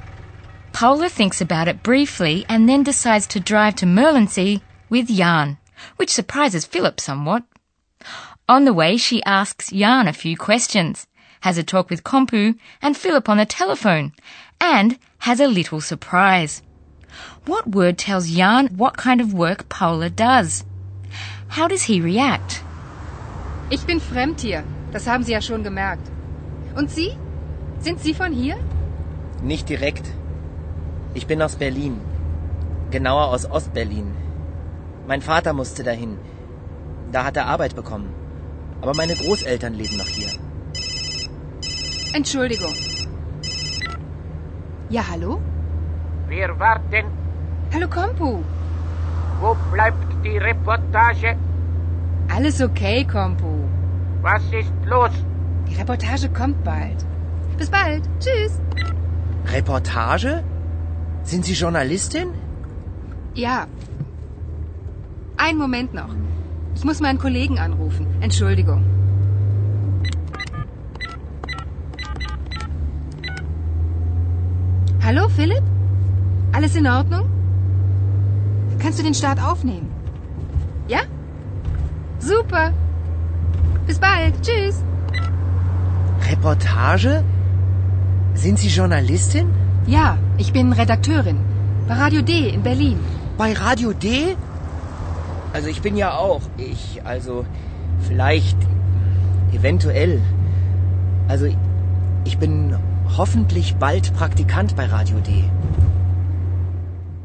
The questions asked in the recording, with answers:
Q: What word tells Jan what kind of work Paula does?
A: And the word reportage told Jan immediately that Paula is a journalist.

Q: How does he react?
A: Well, I'm not surprised in the least that Jan starts stuttering like that.